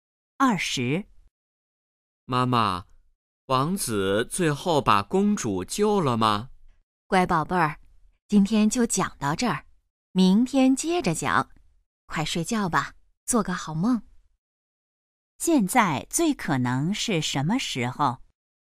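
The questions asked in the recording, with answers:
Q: 现在最可能是什么时候?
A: 晚上睡觉前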